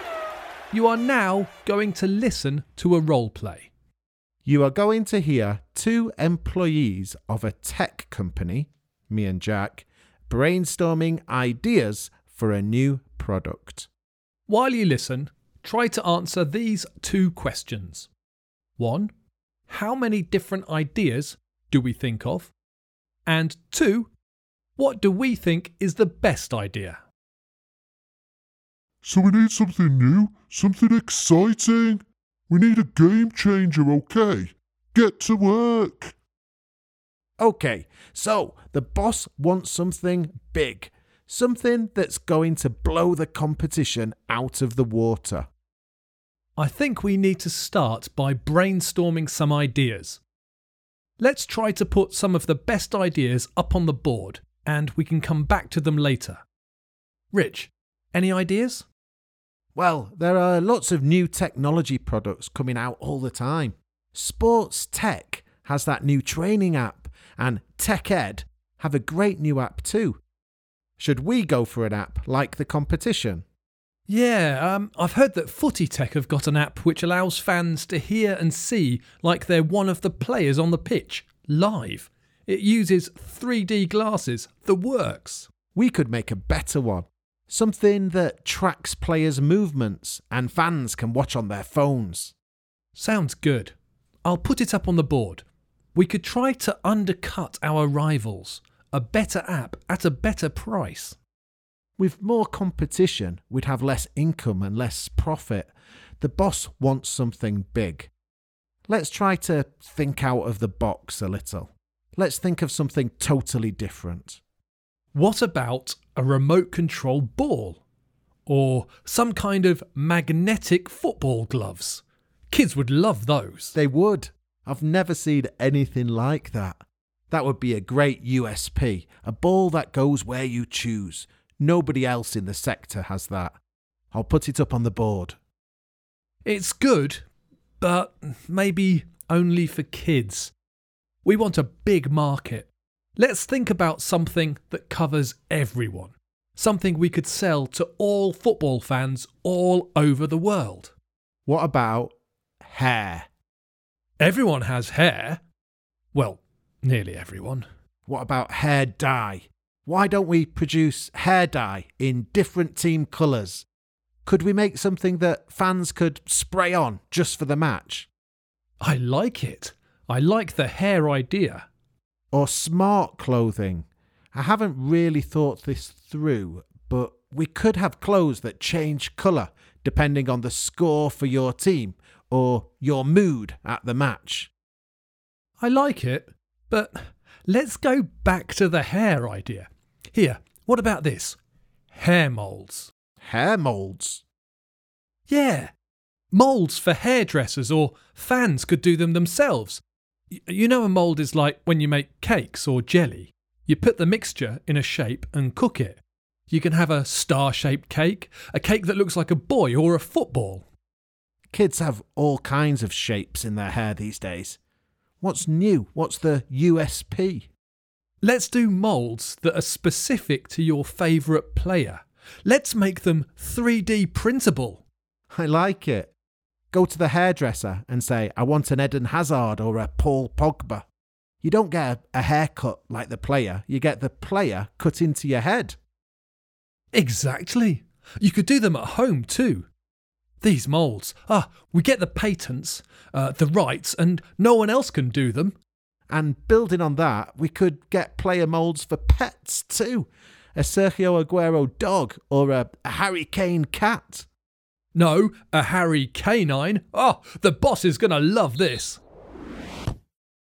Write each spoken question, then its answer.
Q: what do we think is the best idea?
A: The answer, of course, is the hair mould idea.